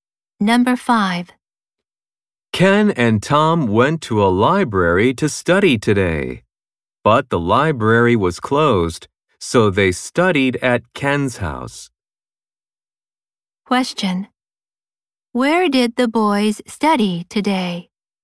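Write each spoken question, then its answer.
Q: Where did the boys study today?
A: At Ken's house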